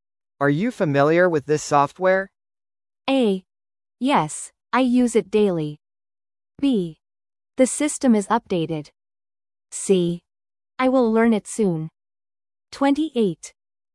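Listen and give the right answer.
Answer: A: Yes, I use it daily.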